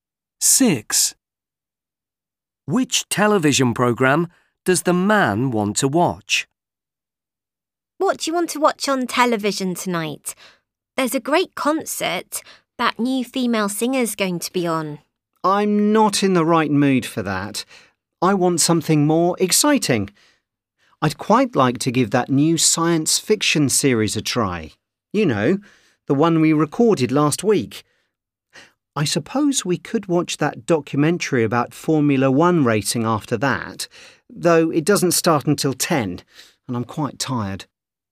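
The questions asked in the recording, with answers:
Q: Which television programme does the man want to watch?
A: The new science fiction series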